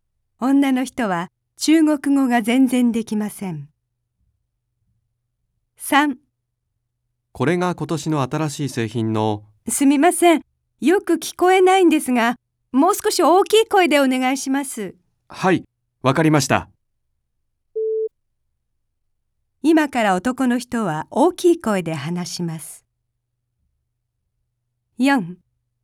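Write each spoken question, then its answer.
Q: 今から男の人は大きい声で話します。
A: ○(正しい)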